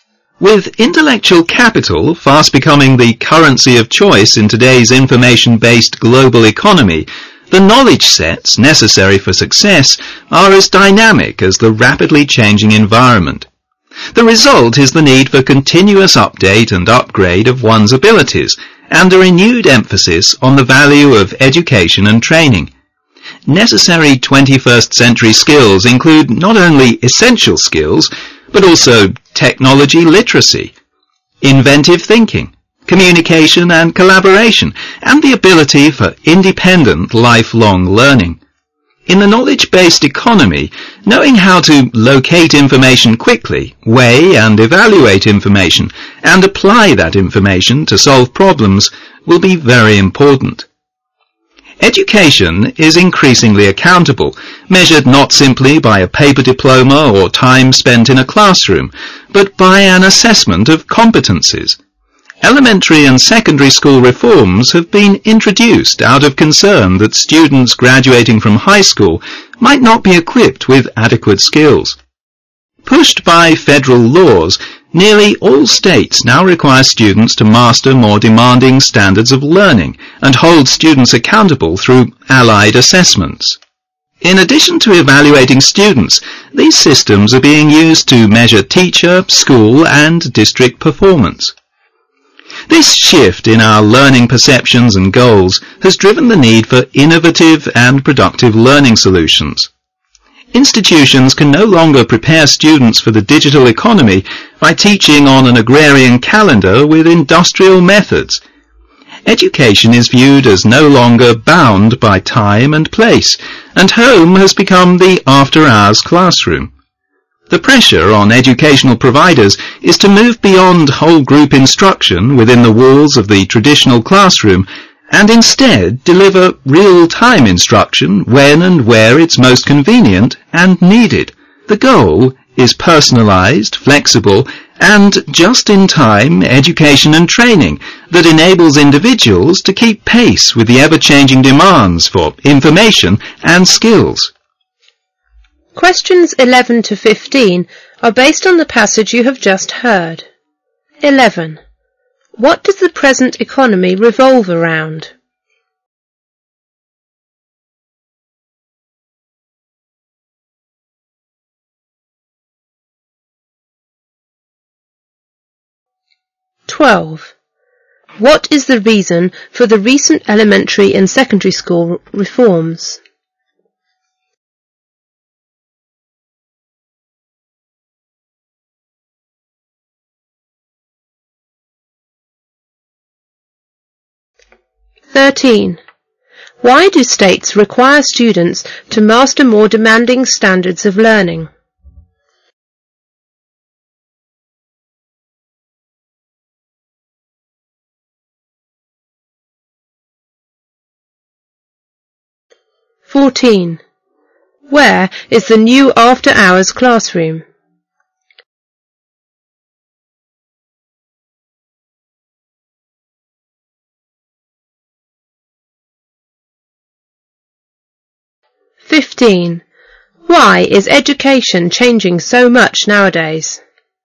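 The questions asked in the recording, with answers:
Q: What does the present economy revolve around?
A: Information and knowledge (intellectual capital)

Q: What is the reason for the recent elementary and secondary school reforms?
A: Concern that high school graduates might not have adequate skills

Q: Where is the new after-hours classroom?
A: At home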